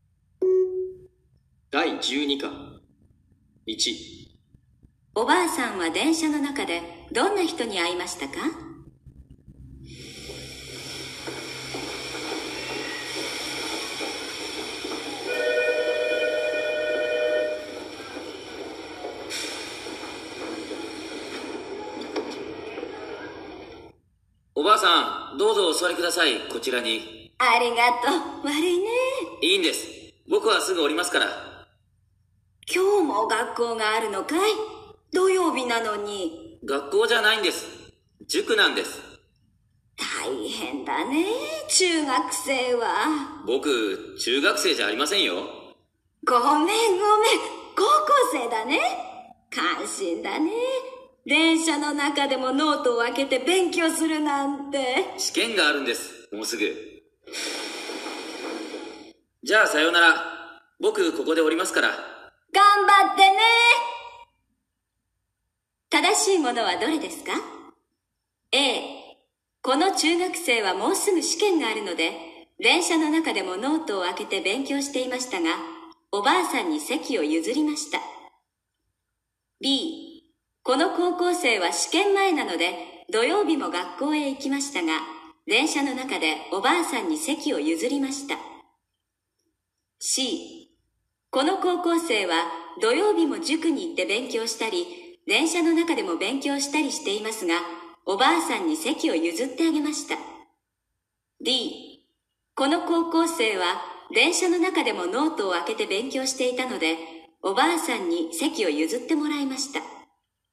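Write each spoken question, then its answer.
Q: 正しいものはどれですか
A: C: この高校生は土曜日も塾に行って勉強したり、電車の中でも勉強したりしていますが、おばあさんに席を譲ってあげました。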